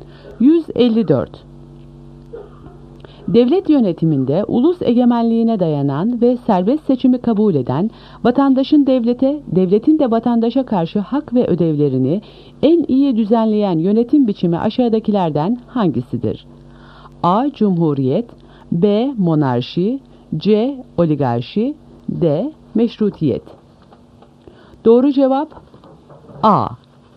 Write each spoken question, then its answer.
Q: Devlet yönetiminde ulus egemenliğine dayanan ve serbest seçimi kabul eden vatandaşın devlete, devletin de vatandaşa karşı hak ve ödevlerini en iyi düzenleyen yönetim biçimi aşağıdakilerden hangisidir?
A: Doğru cevap A. Cumhuriyet.